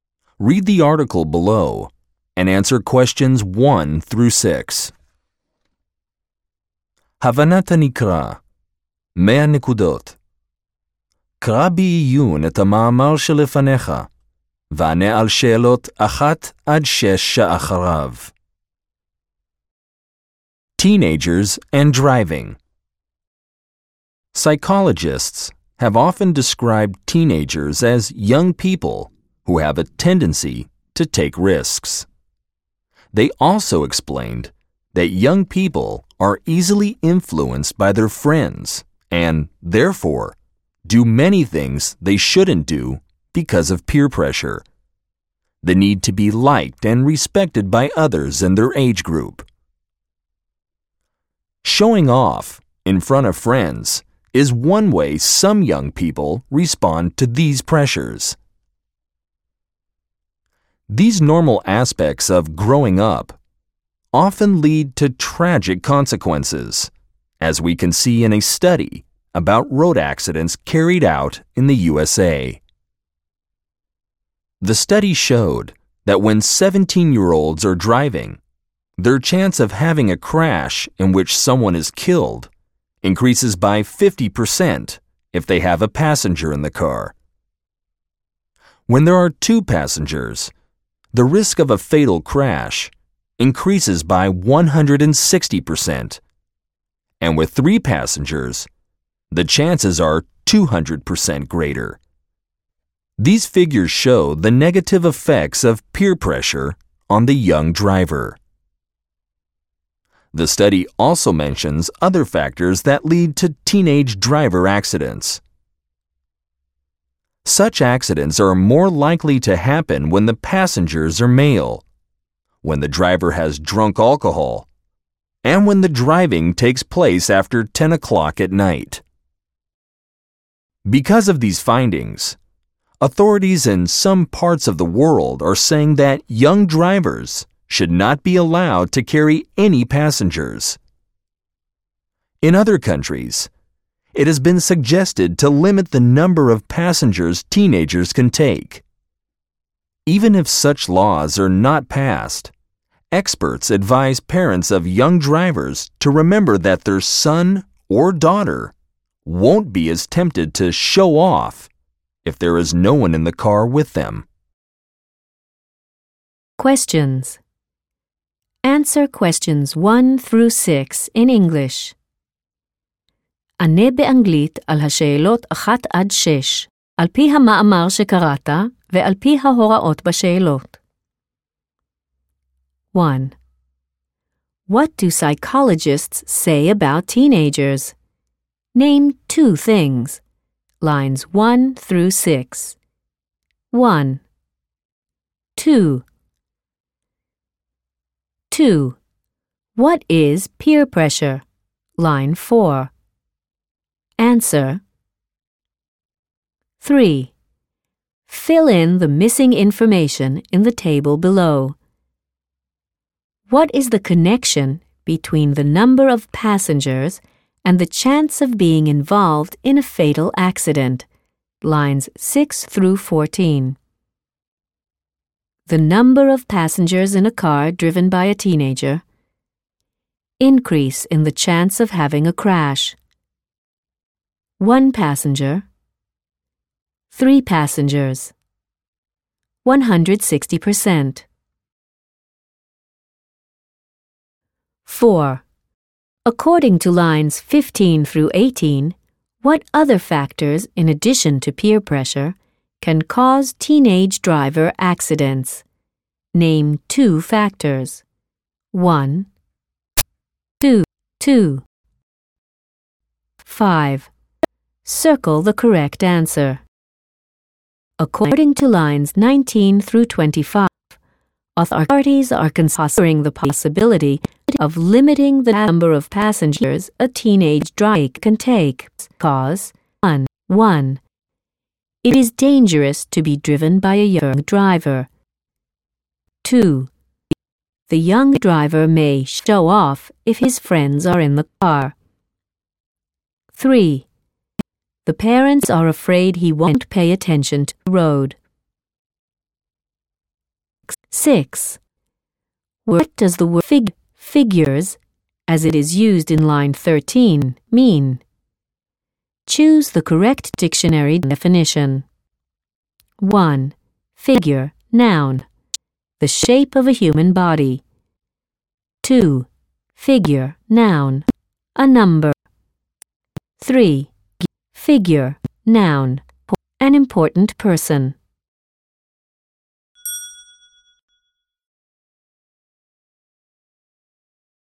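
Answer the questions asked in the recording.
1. They tend to take risks and are easily influenced by their friends
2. The need to be liked and respected by others in their age group
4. Male passengers, the driver having drunk alcohol, driving after 10 o'clock at night
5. 2: The young driver may show off if his friends are in the car.
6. 2: Figure, noun. A number.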